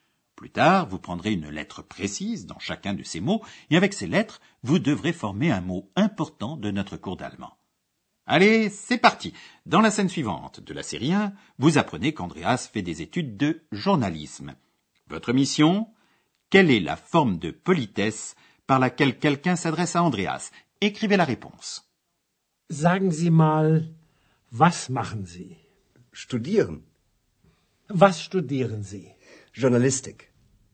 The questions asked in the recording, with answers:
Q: Votre mission Quelle est la forme de politesse par laquelle quelqu'un s'adresse à Andreas Écrivez la réponse.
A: Ce mot est zi, vous.